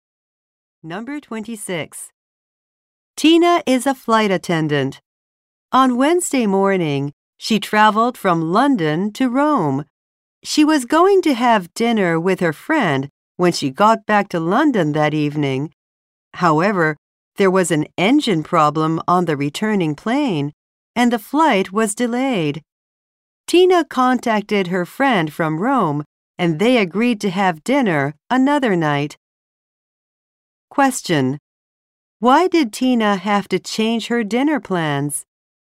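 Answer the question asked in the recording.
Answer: Her return flight was delayed by an engine problem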